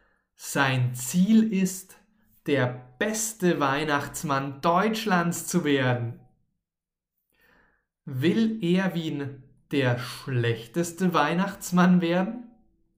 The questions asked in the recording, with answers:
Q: Will Erwin der schlechteste Weihnachtsmann werden?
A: Nein. Er will nicht der schlechteste Weihnachtsmann werden.